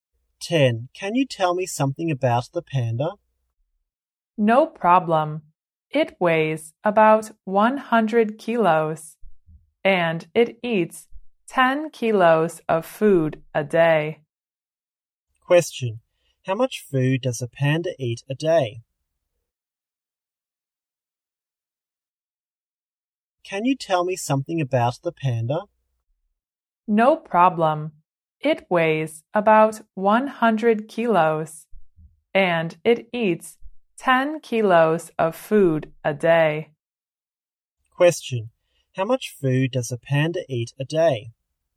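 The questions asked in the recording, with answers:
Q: How much food does a panda eat a day?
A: About 10 kilos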